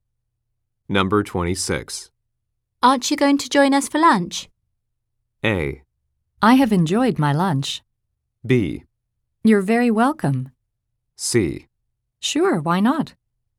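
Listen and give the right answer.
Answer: C: Sure, why not?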